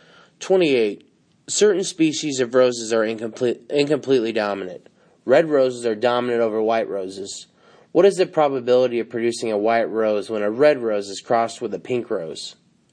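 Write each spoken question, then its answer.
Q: What is the probability of producing a white rose when a red rose is crossed with a pink rose?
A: D: 0%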